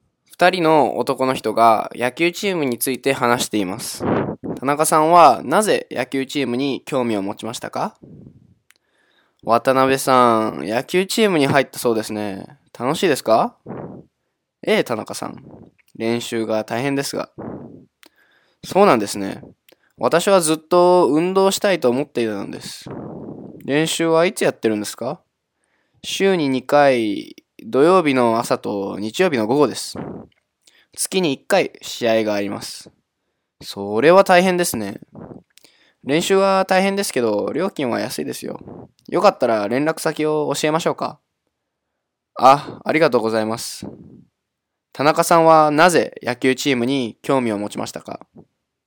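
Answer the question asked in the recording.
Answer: ずっと運動したいと思っていたから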